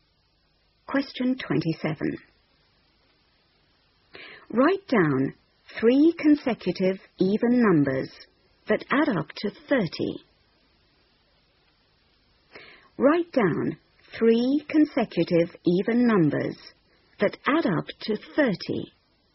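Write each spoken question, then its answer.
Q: Write down three consecutive even numbers that add up to 30.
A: 8, 10, 12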